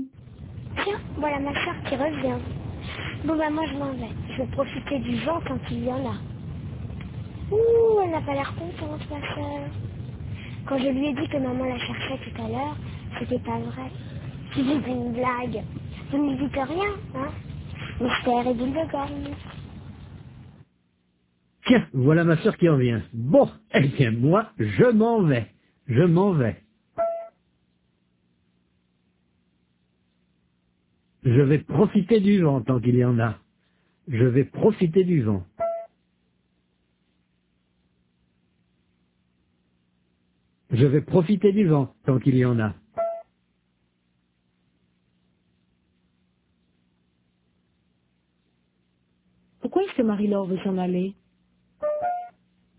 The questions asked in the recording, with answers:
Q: Pourquoi est-ce que Marie-Laure veut s'en aller?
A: Parce qu'elle veut profiter du vent, tant qu'il y en a.